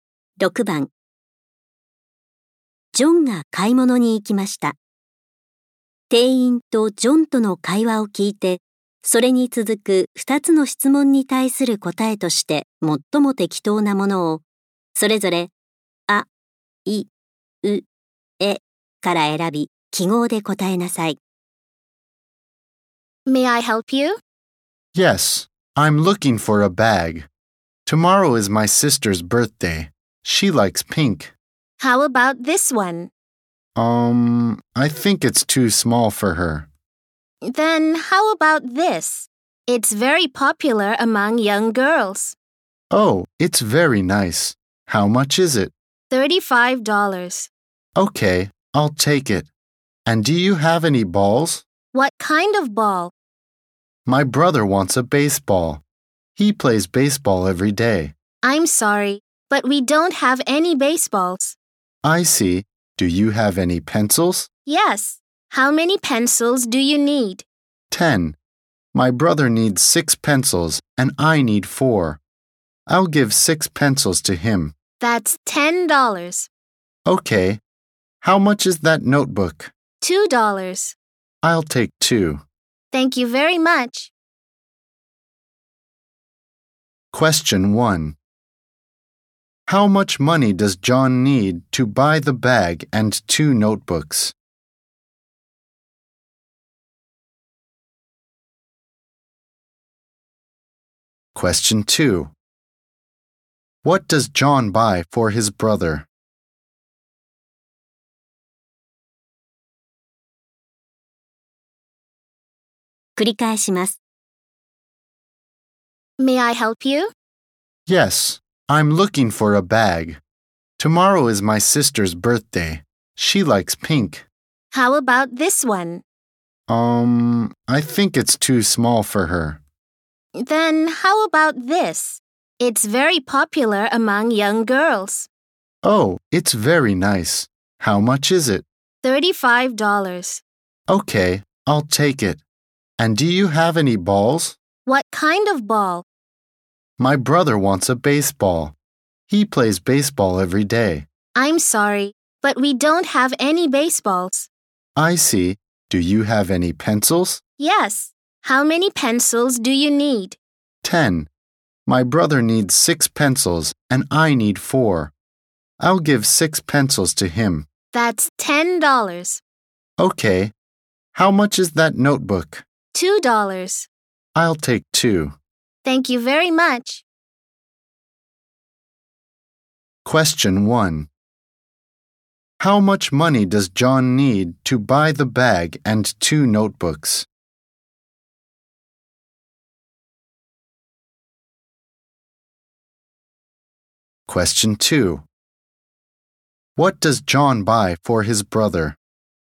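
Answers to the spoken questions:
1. $39
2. Six pencils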